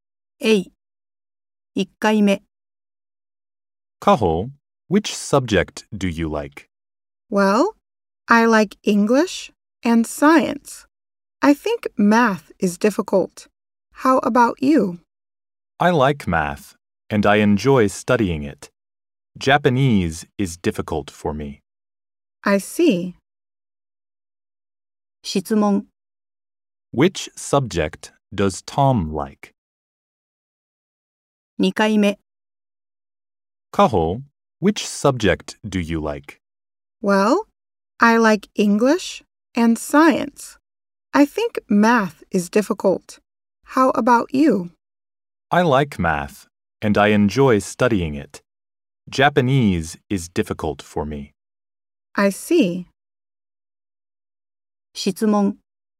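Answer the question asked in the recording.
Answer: Math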